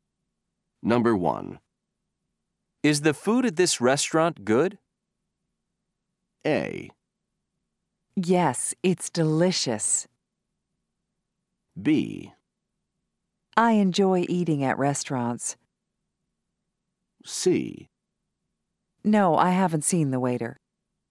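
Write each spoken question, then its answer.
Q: Is the food at this restaurant good?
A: A: Yes, it's delicious.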